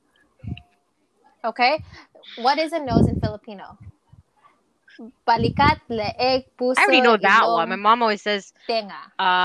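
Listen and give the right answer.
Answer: ilong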